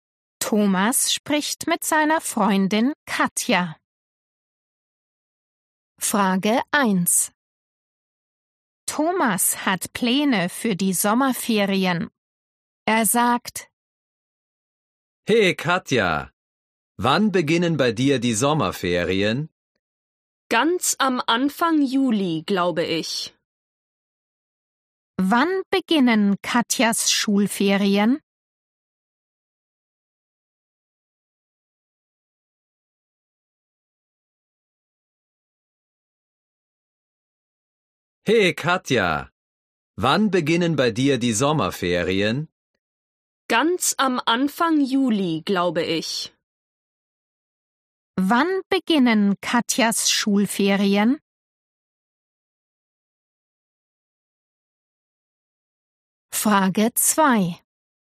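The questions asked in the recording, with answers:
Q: Wann beginnen Katjas Schulferien?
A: Ganz am Anfang Juli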